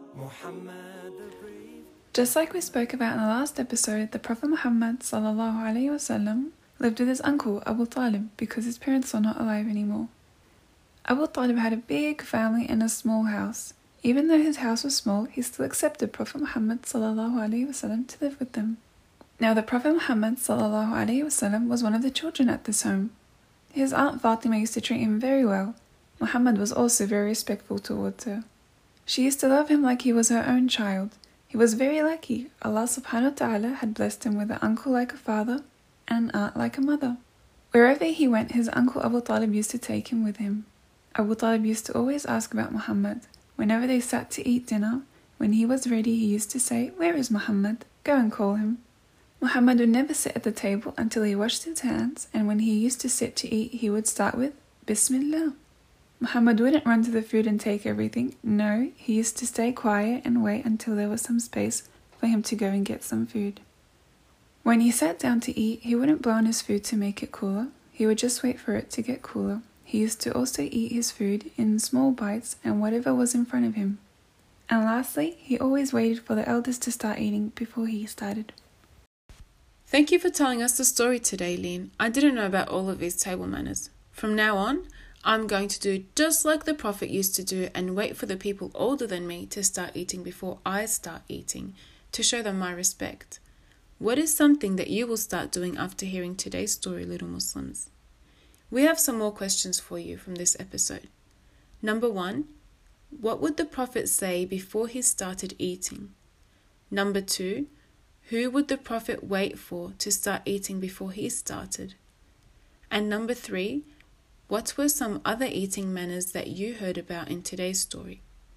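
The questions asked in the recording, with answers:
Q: what would the Prophet say before he started eating?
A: Bismillah

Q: who would the prophet wait for to start eating before he started?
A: The elders

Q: what were some other eating manners that you heard about in today's story?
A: Washing hands, waiting quietly, not blowing on food, eating small bites from what was in front of him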